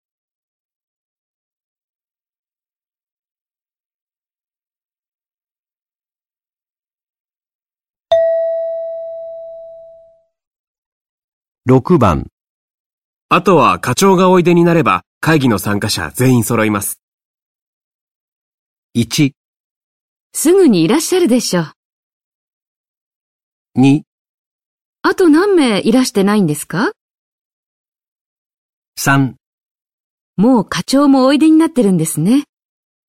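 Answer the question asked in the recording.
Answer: 1: すぐにいらっしゃるでしょう。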